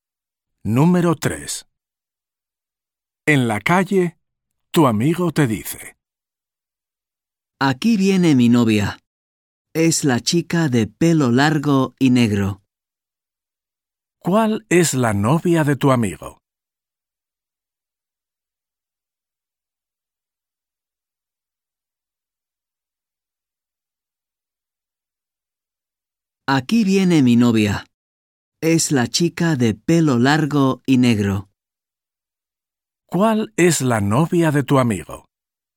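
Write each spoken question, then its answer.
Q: ¿Cuál es la novia de tu amigo?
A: la chica de pelo largo y negro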